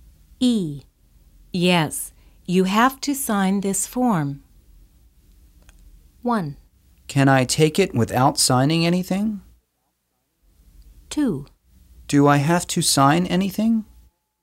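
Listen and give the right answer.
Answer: 2: Do I have to sign anything?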